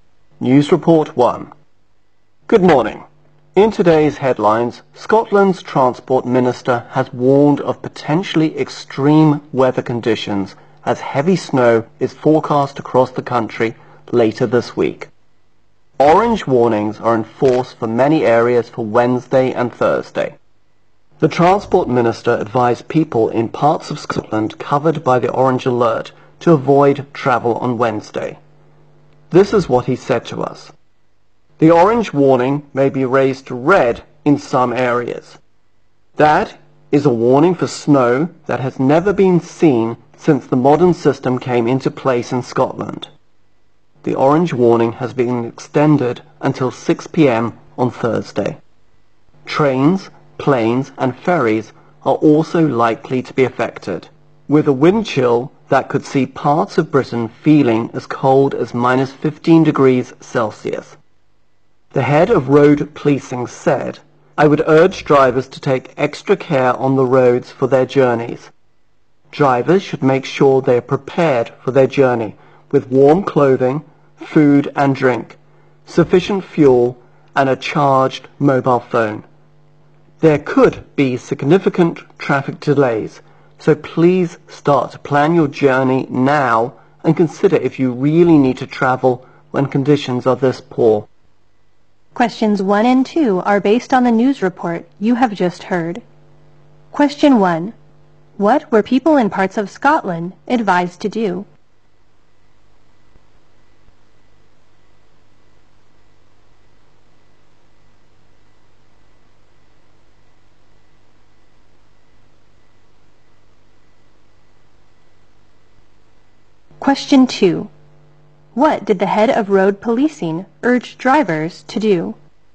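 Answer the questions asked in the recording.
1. Avoid travel on Wednesday
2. Take extra care on the roads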